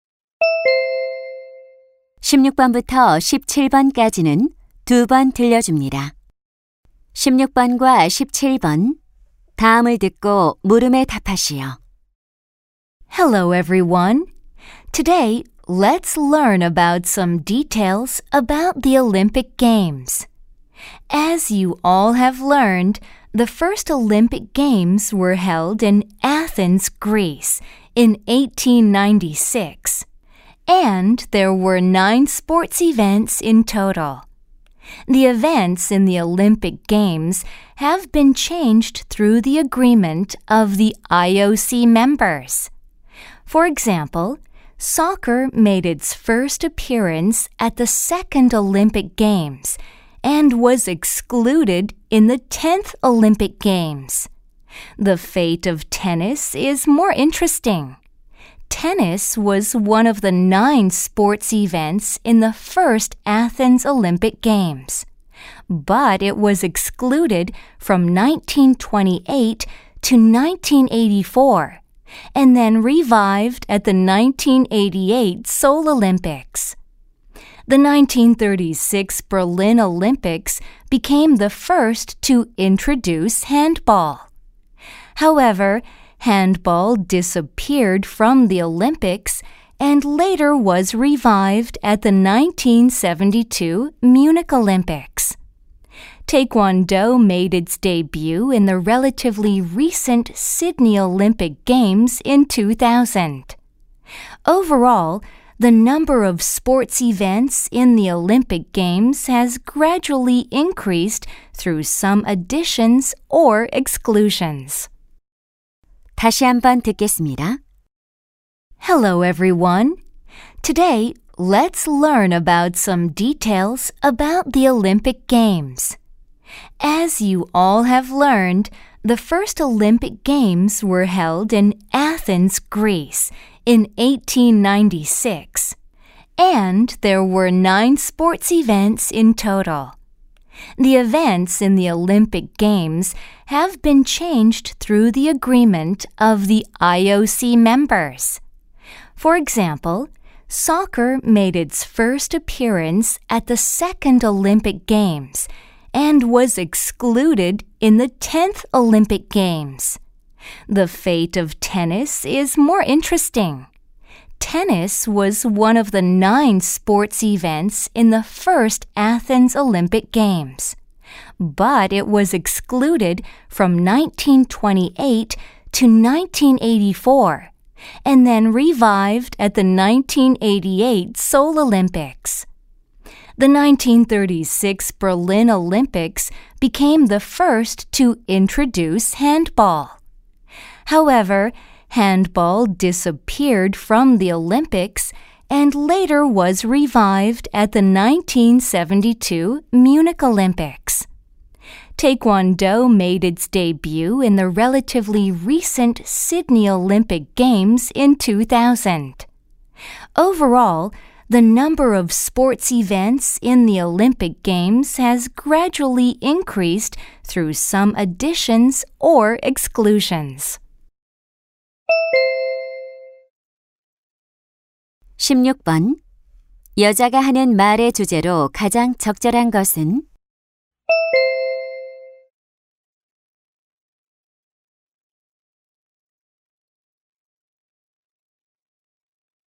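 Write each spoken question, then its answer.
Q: 여자가 하는 말의 주제로 가장 적절한 것은?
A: 올림픽 경기 종목의 변화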